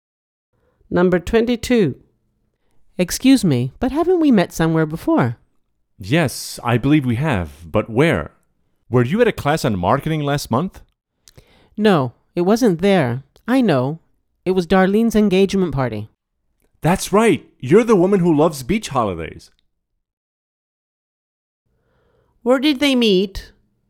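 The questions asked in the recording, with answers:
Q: Where did they meet?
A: At Darlene's engagement party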